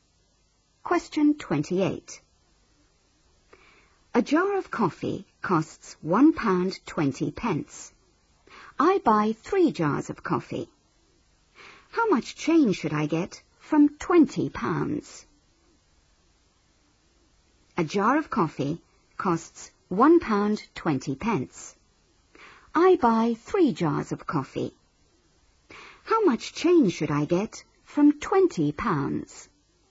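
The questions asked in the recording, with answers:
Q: How much change should I get from £20?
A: £16.40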